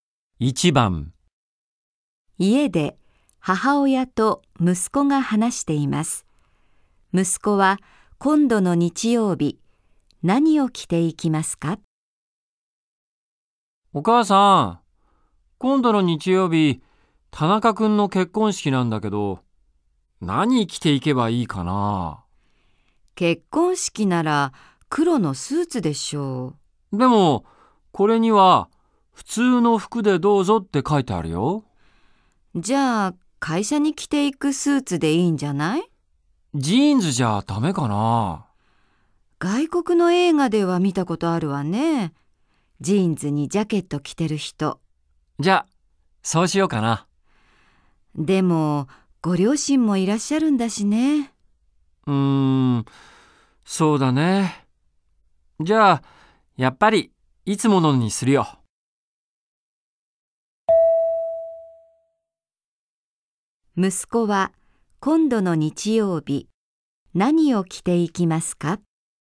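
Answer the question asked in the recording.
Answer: いつも会社に着ていくスーツ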